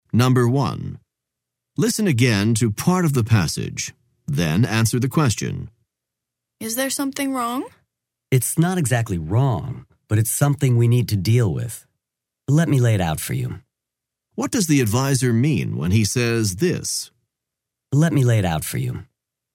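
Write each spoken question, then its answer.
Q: What does the advisor mean when he says this?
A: He is going to explain the situation to the student clearly.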